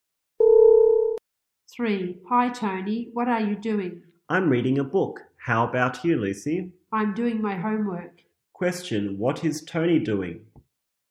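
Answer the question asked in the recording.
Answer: Reading a book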